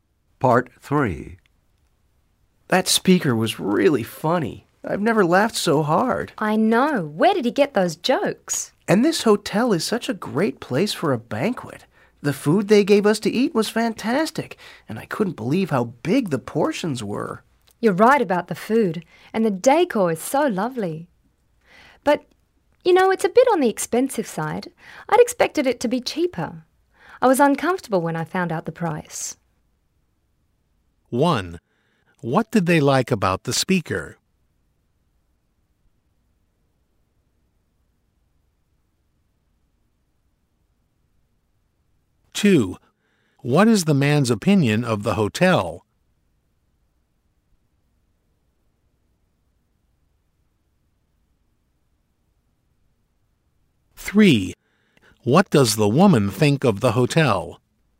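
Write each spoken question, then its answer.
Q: What did they like about the speaker?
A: He was really funny.

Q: What is the man's opinion of the hotel?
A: It's a great place for a banquet with fantastic food and big portions.

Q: What does the woman think of the hotel?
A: It's lovely but more expensive than she expected.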